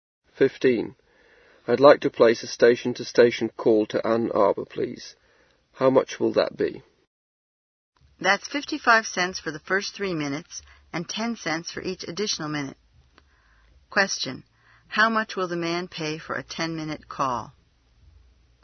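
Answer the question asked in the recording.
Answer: $1.25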